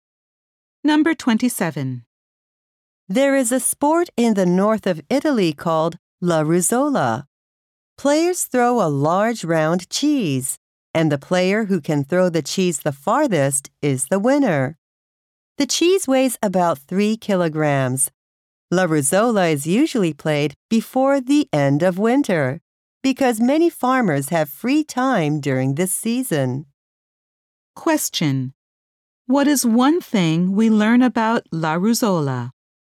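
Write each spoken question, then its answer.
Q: What is one thing we learn about La Ruzzola?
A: Players throw a large round cheese as far as they can.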